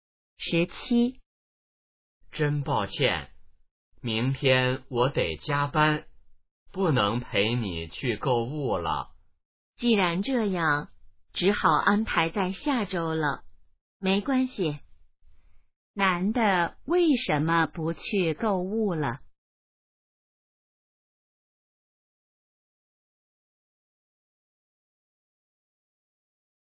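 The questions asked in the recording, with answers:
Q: 男的为什么不去购物了?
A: 明天要加班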